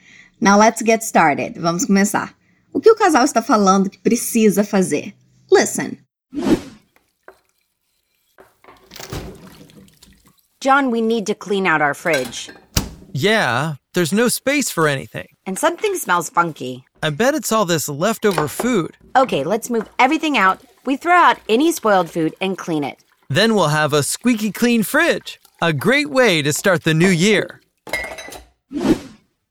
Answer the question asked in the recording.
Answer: Ok, eles precisam limpar a geladeira.